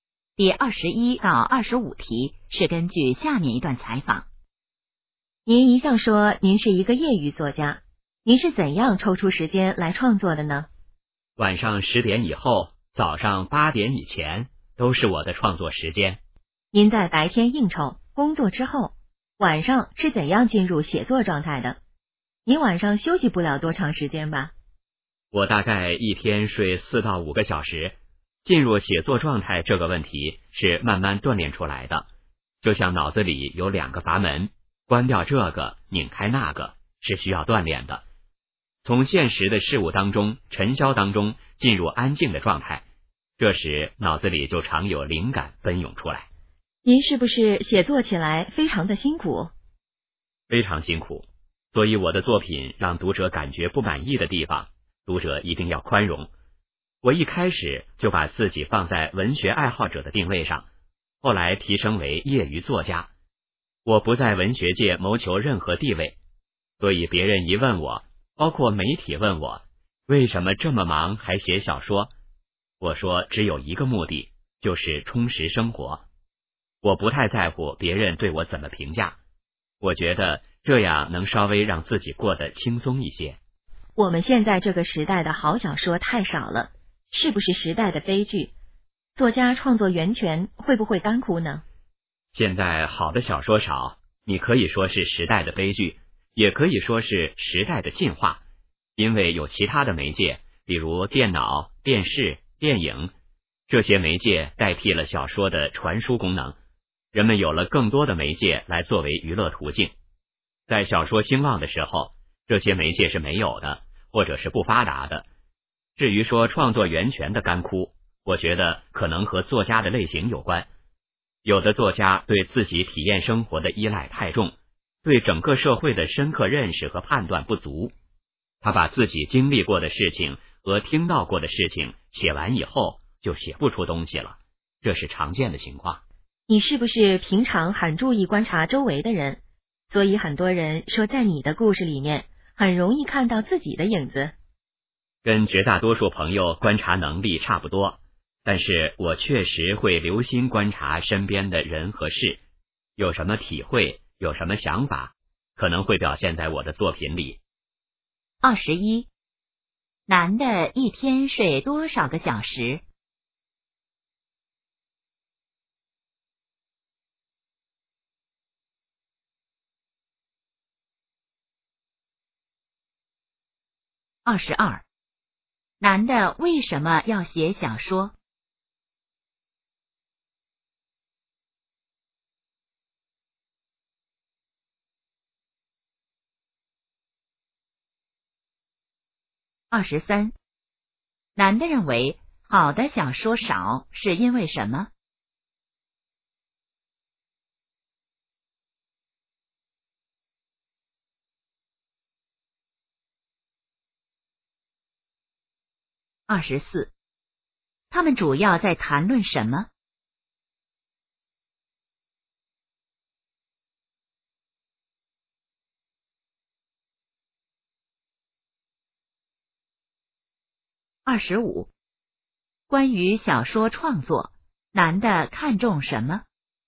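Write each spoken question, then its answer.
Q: 男的一天睡多少个小时?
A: 四到五个小时

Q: 男的为什么要写小说?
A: 为了充实生活

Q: 男的认为好的小说少是因为什么?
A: 其他媒介代替了小说的传输功能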